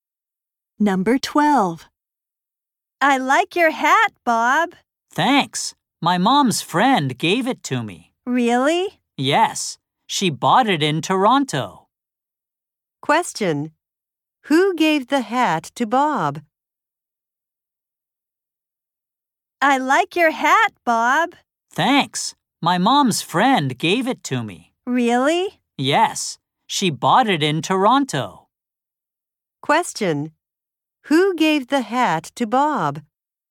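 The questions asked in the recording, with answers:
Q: Who gave the hat to Bob?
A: His mom's friend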